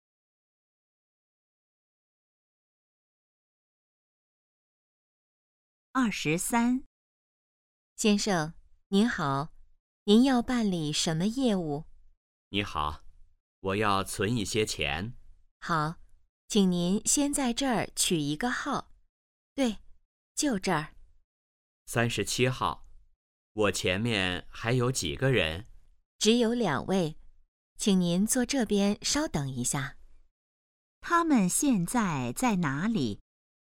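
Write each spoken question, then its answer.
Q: 他们现在在哪里?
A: 银行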